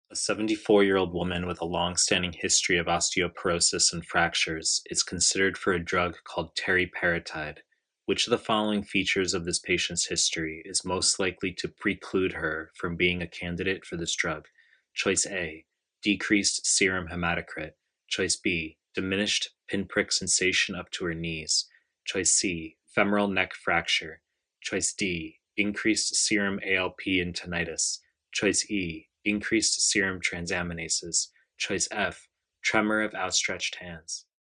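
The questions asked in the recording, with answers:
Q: Which of the following features of this patient's history is most likely to preclude her from being a candidate for this drug?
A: D: increased serum ALP and tinnitus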